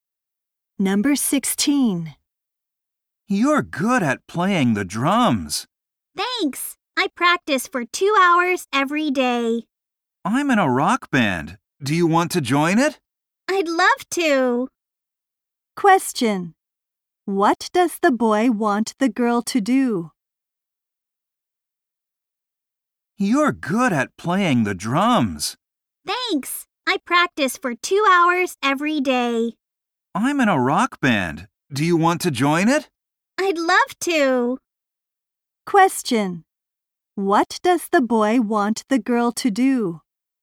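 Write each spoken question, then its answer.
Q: What does the boy want the girl to do?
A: Join his rock band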